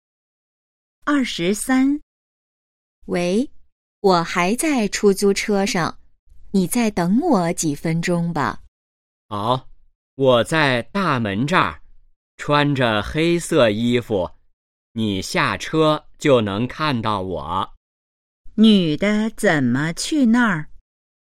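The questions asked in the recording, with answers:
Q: 女的怎么去那儿?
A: 坐出租车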